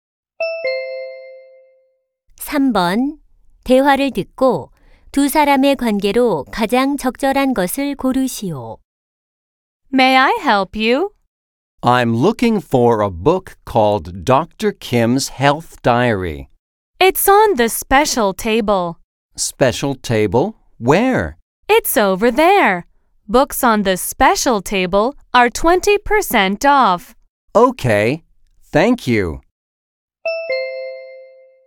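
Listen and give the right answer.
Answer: 서점 직원과 손님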